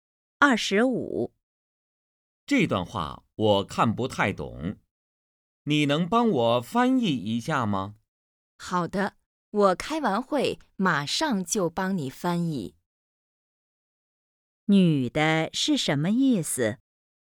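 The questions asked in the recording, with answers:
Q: 女的是什么意思?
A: 开完会再帮他翻译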